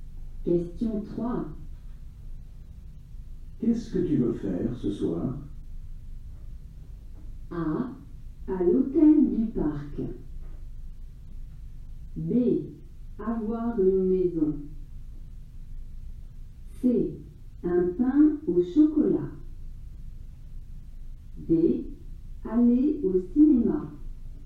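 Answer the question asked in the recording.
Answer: D: Aller au cinéma.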